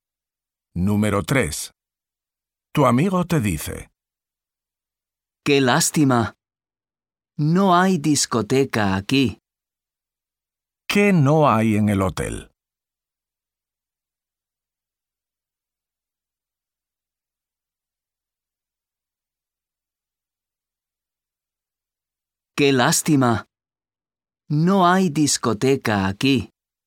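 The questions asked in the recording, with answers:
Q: ¿Qué no hay en el hotel?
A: Discoteca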